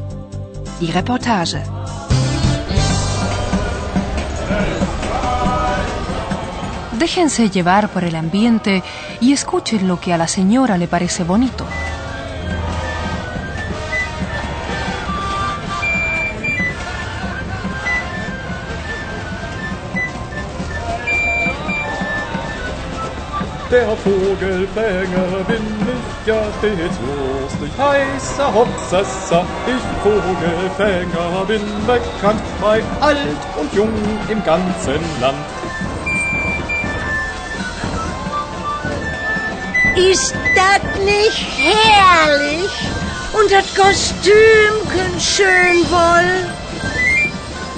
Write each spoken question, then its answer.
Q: escuchen lo que a la señora le parece bonito.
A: Una señora está encantada con la música y el disfraz de plumas que lleva un hombre que va de papageno